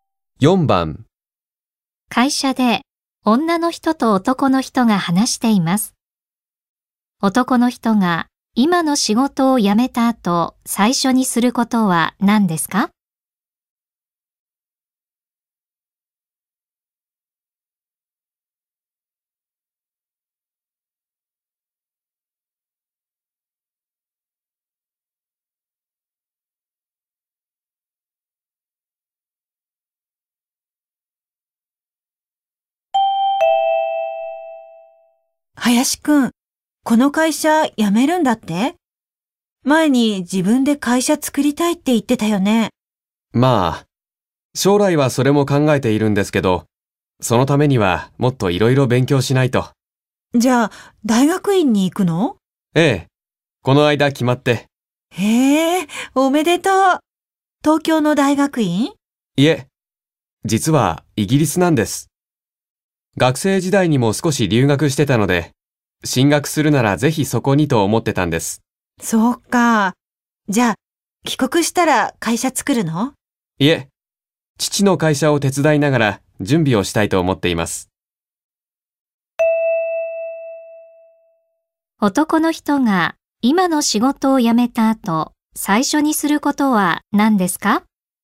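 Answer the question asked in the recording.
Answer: イギリスの大学院に行く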